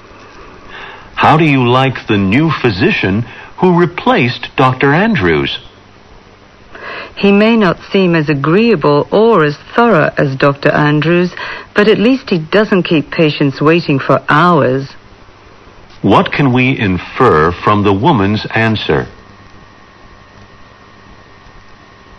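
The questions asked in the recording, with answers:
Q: What can we infer from the woman's answer?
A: She likes that the new doctor doesn't keep patients waiting, though he seems less agreeable and thorough than Dr. Andrews.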